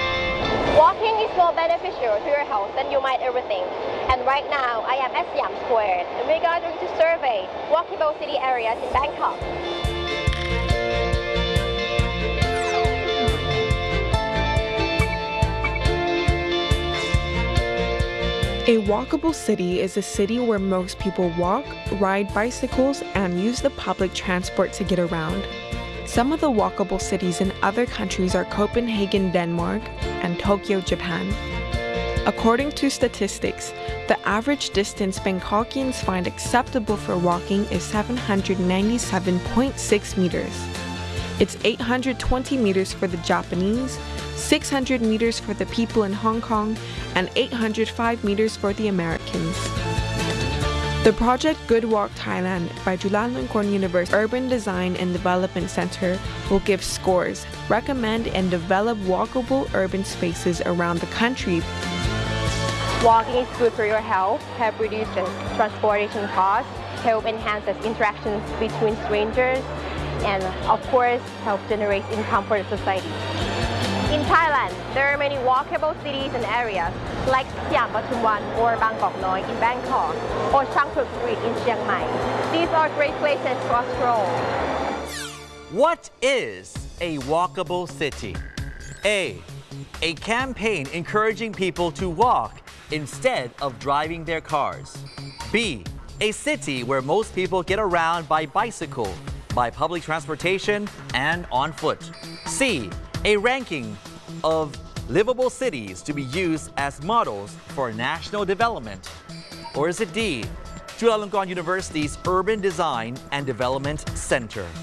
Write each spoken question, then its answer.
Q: What is a walkable city?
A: The answer is B, a city where most people get around by bicycle, by public transportation, and on foot.